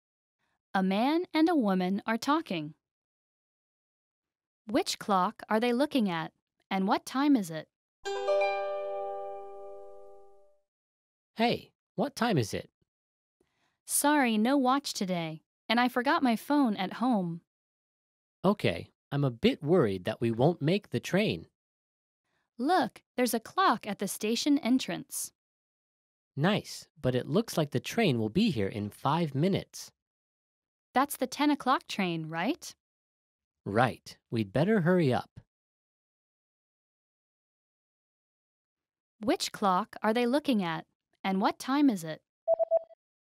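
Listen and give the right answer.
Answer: The clock at the station entrance; about 9:55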